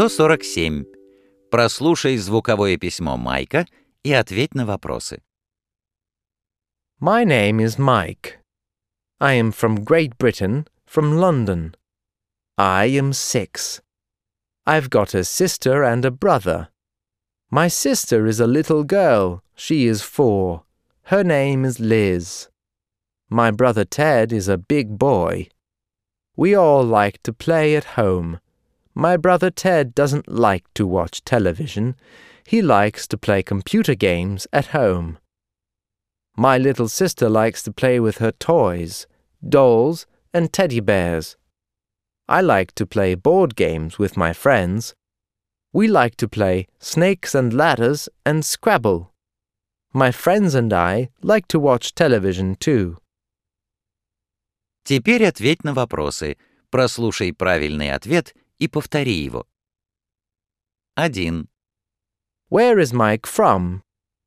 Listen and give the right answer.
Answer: He is from Great Britain.